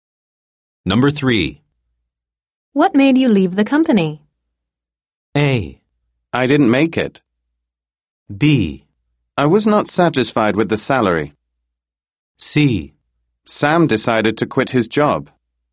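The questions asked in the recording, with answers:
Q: What made you leave the company?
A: B: I was not satisfied with the salary.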